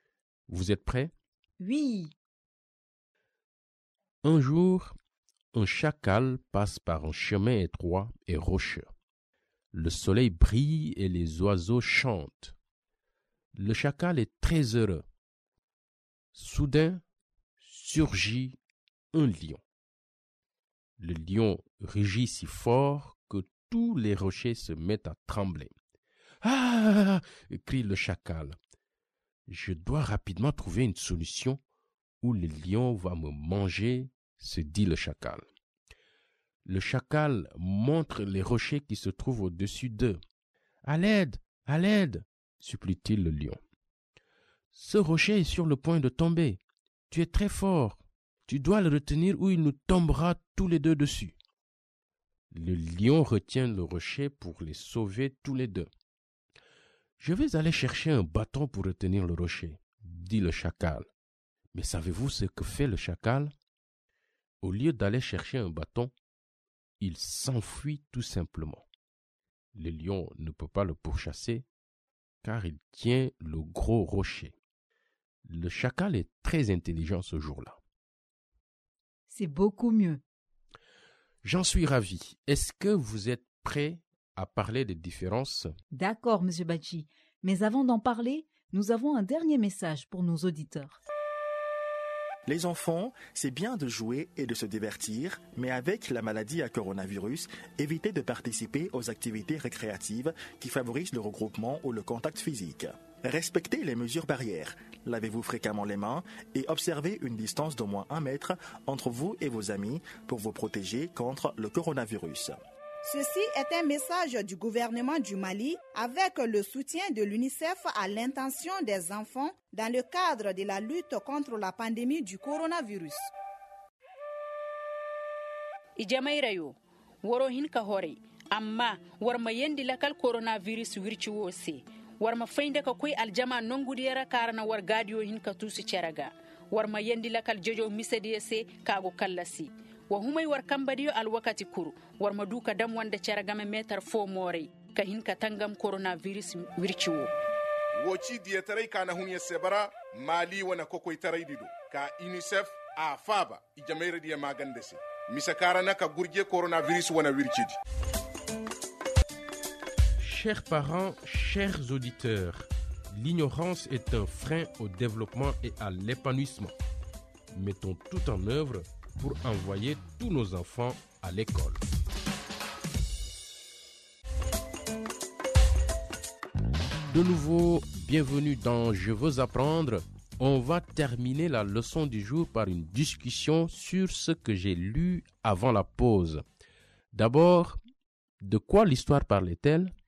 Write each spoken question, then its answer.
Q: D'abord, de quoi l'histoire parlait-elle?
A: C'est une histoire sur un chacal qui roule un lion.